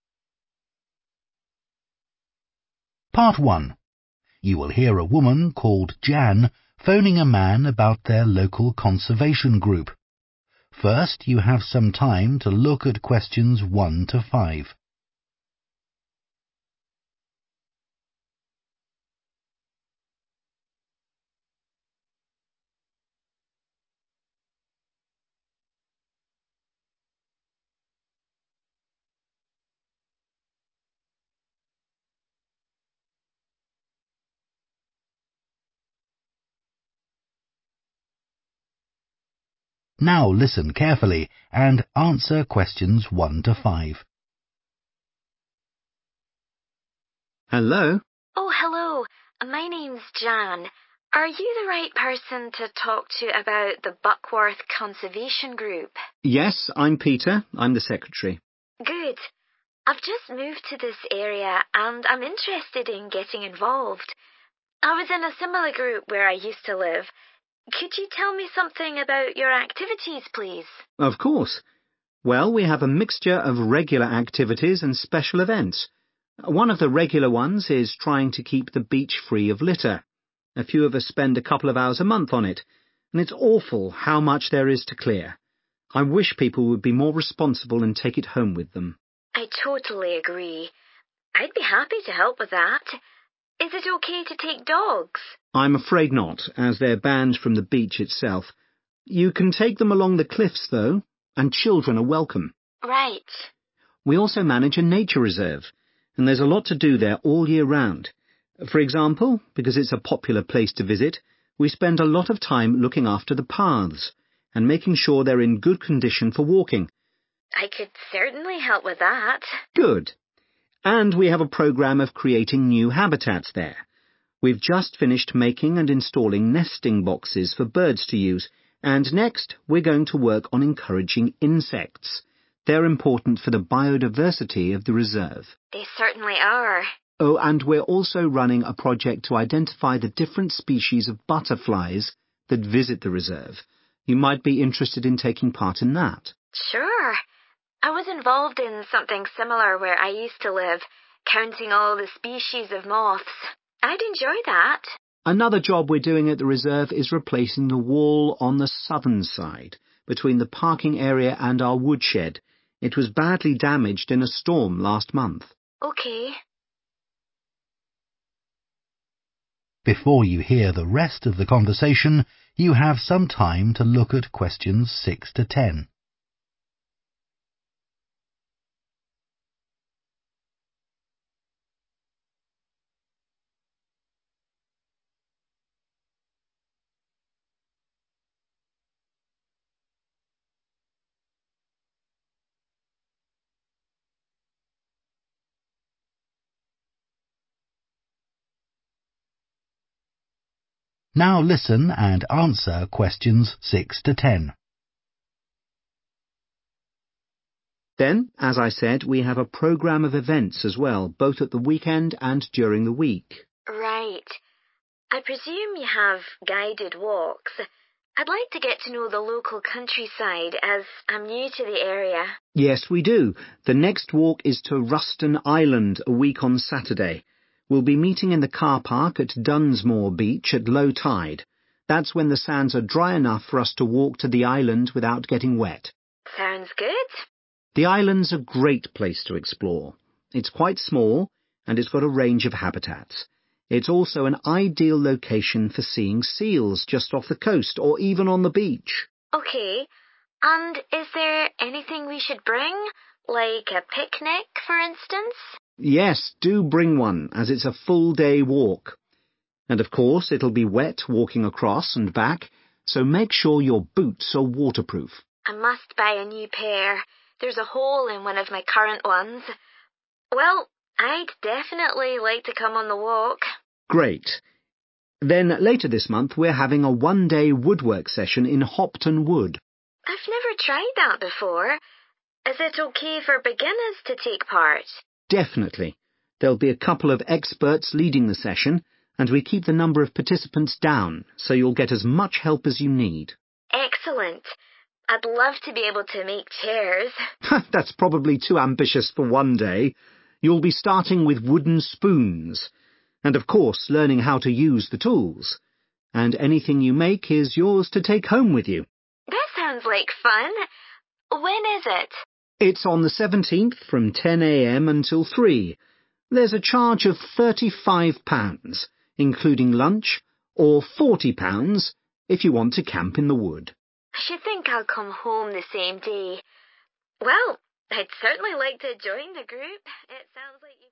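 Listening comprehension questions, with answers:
Complete the notes below. Write ONE WORD AND/OR A NUMBER for each answer.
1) making sure the beach does not have 1 ........................ on it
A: litter

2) no 2 ........................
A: dogs

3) next task is taking action to attract 3 ........................ to the place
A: insects

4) identifying types of 4 ........................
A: butterflies

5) building a new 5 ........................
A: wall

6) walk across the sands and reach the 6 ........................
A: island

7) wear appropriate 7 ........................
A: boots

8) suitable for 8 ........................ to participate in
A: beginners

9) making 9 ........................ out of wood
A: spoons

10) cost of session (no camping): 10 £ ........................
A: 35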